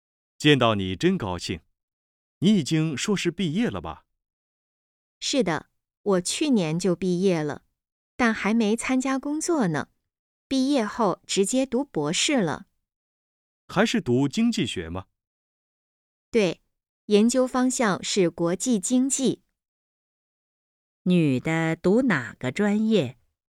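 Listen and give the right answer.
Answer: 经济学(国际经济)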